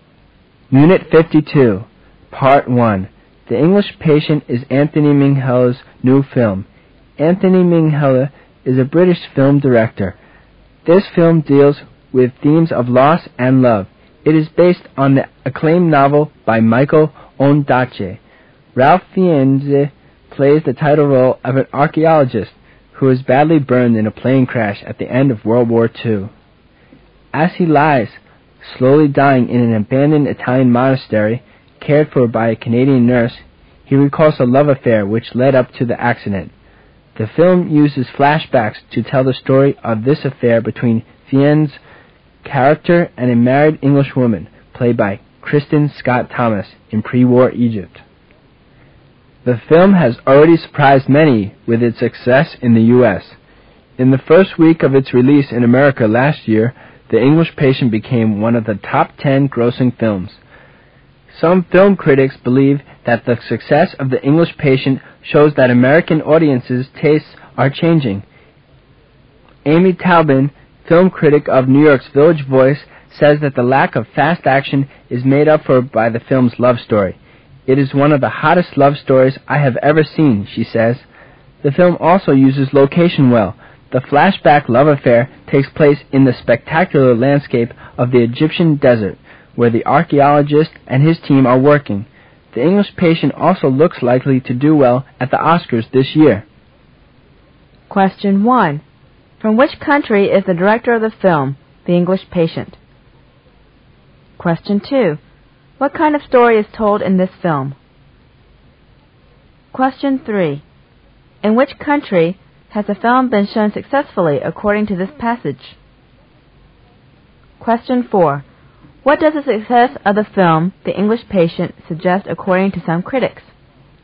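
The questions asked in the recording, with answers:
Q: From which country is the director of the film, The English Patient?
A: Britain

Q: What kind of story is told in this film?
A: A love story

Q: In which country has the film been shown successfully according to this passage?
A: The U.S.

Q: What does the success of the film, The English Patient, suggest according to some critics?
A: American audiences' tastes are changing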